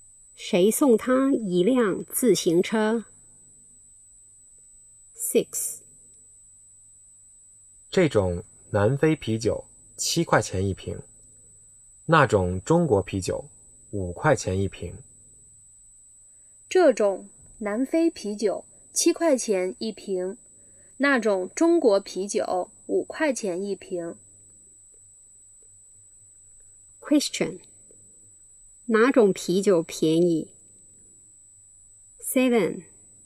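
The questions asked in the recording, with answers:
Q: 哪种啤酒便宜?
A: 中国啤酒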